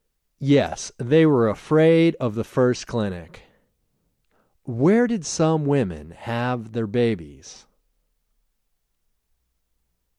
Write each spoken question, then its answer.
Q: Where did some women have their babies?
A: Some women had their babies in the street.